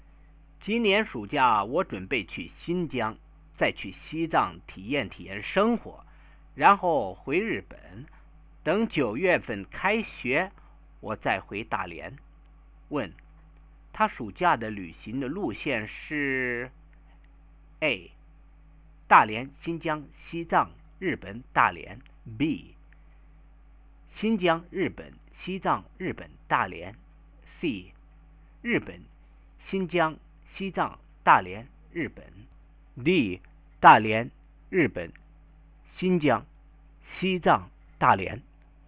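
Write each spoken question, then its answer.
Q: 问,他暑假的旅行的路线是?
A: A: 大连、新疆、西藏、日本、大连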